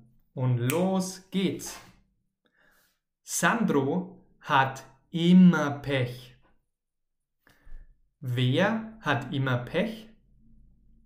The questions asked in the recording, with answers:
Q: Wer hat immer Pech?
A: Sandro. Sandro hat immer Pech.